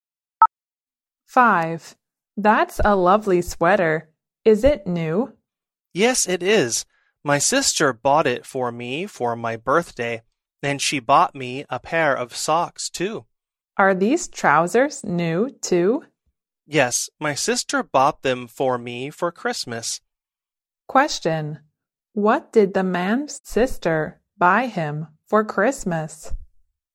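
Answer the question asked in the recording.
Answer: Trousers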